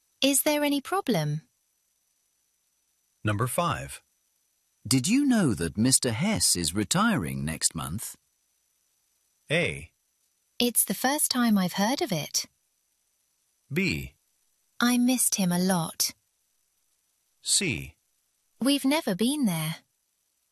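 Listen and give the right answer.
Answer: A: It's the first time I've heard of it.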